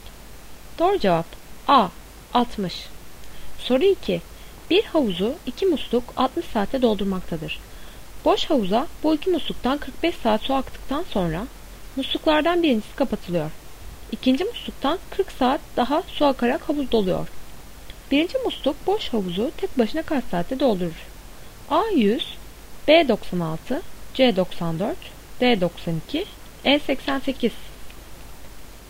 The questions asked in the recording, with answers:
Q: Birinci musluk boş havuzu tek başına kaç saatte doldurur?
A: Doğru cevap B 96.